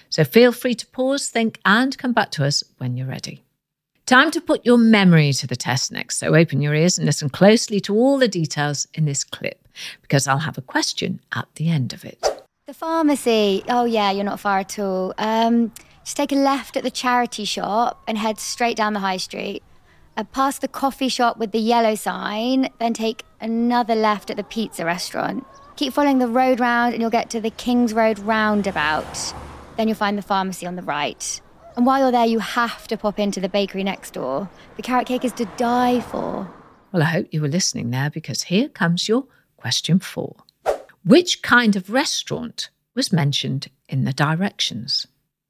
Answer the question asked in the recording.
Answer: The answer was a pizza restaurant.